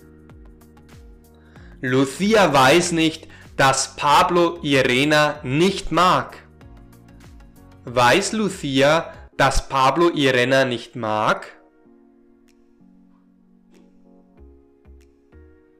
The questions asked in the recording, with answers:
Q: Weiß Lucia, dass Pablo Irena nicht mag?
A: Nein, sie weiß es nicht. Lucia weiß es nicht.